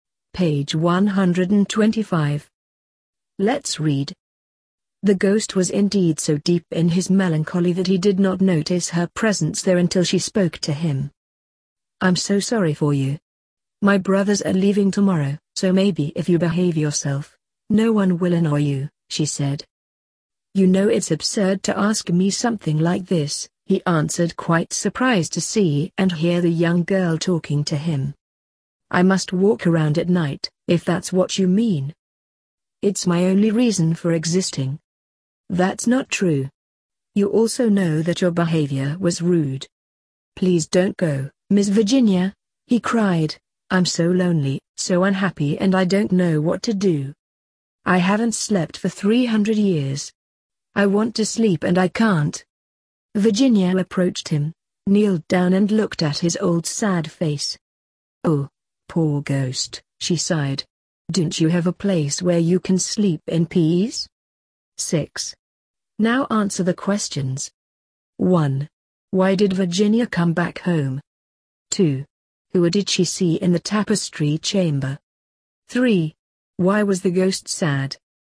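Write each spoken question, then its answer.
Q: Why was the ghost sad?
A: He was lonely and unhappy because he hadn't slept for 300 years and couldn't sleep.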